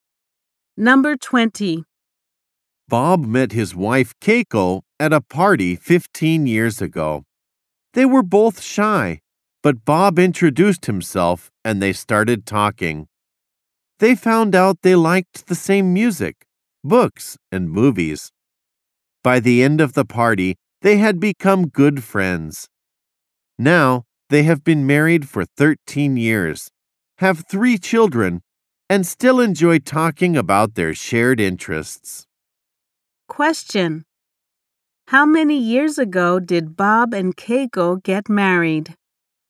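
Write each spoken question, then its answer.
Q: How many years ago did Bob and Keiko get married?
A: 13 years ago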